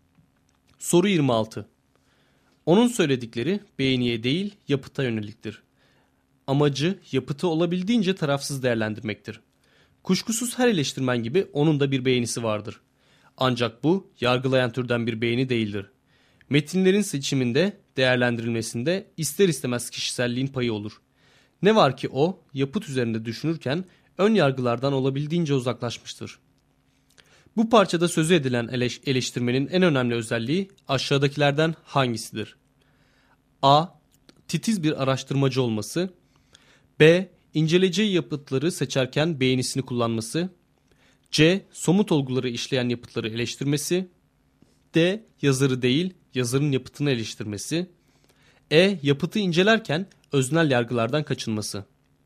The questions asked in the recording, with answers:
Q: Bu parçada sözü edilen eleştirmenin en önemli özelliği aşağıdakilerden hangisidir?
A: Doğru cevap E şıkkı.